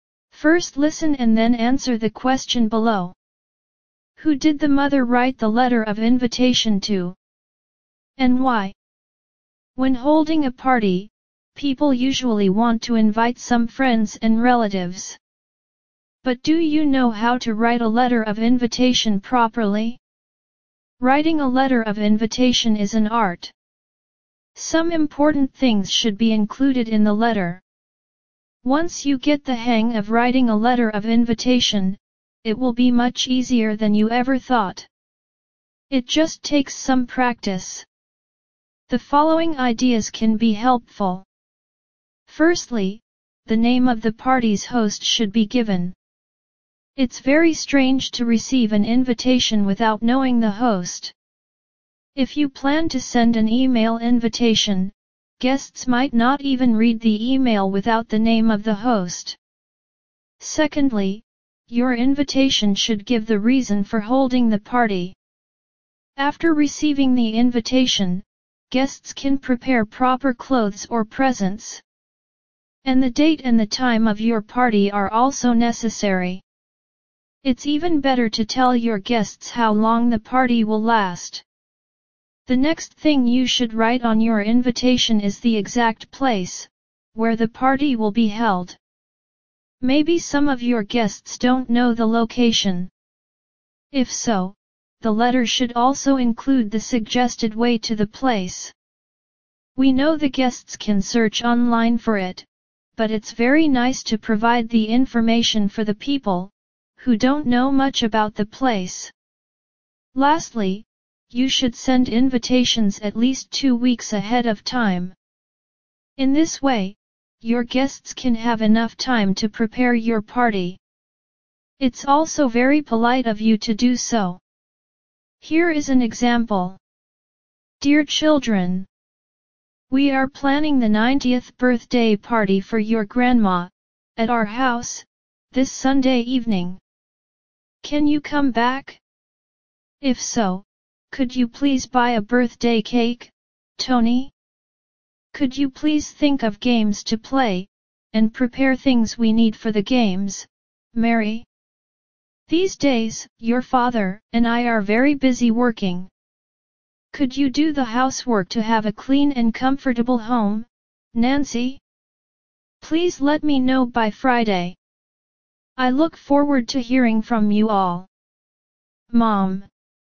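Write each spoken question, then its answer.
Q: Who did the mother write the letter of invitation to? And why?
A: To her children (Tony, Mary and Nancy), to invite them to their grandma's 90th birthday party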